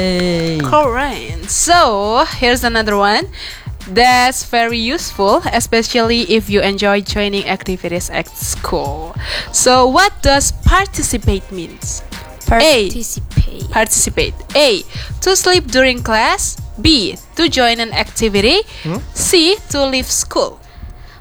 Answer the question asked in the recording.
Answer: 1, 2, 3, B.